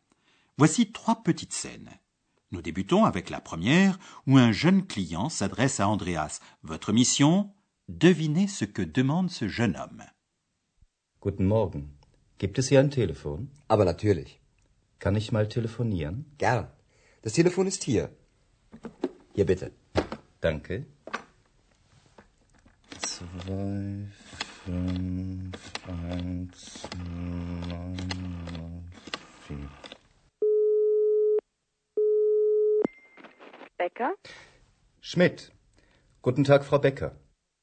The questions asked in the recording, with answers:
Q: Devinez ce que demande ce jeune homme.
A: Le jeune homme demande où il y a un téléphone.